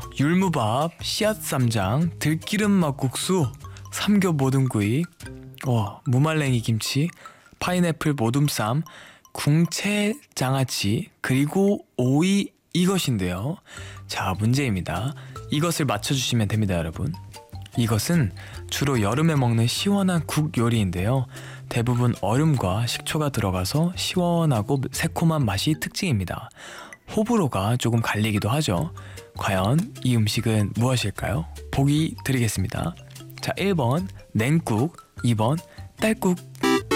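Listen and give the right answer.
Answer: 1번: 냉국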